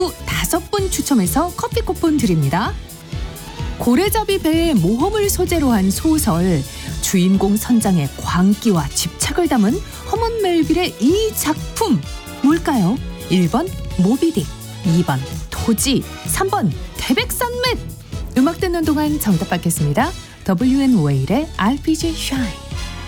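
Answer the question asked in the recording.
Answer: 1번: 모비딕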